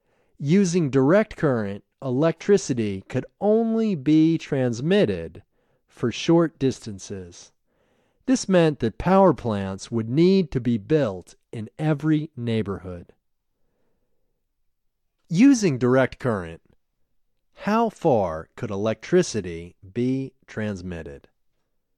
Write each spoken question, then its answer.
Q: Using direct current, how far could electricity be transmitted?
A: Using direct current, electricity could only be transmitted for short distances.